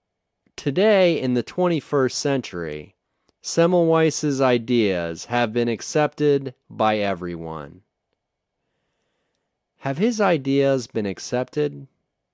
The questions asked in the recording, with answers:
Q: Have his ideas been accepted?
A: Yes, his ideas have been accepted by everyone.